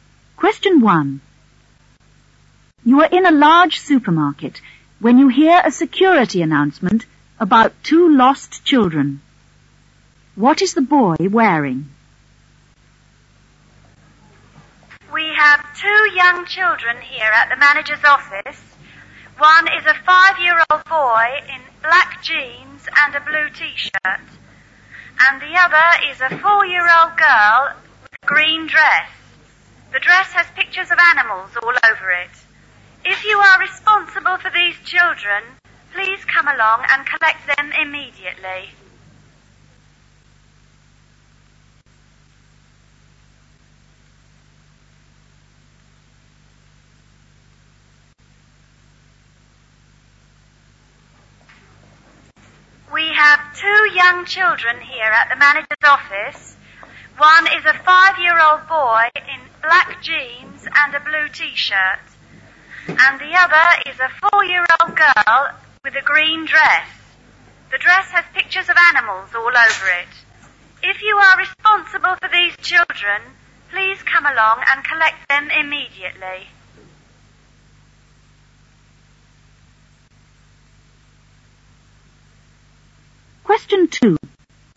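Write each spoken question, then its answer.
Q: What is the boy wearing?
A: Black jeans and a blue t-shirt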